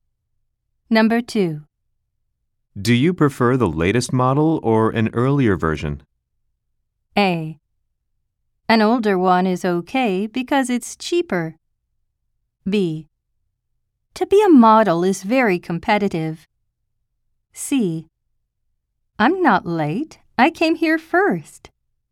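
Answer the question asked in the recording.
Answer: A: An older one is okay because it's cheaper.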